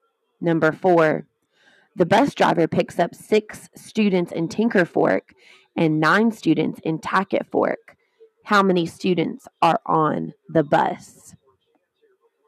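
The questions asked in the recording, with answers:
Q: How many students are on the bus?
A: 15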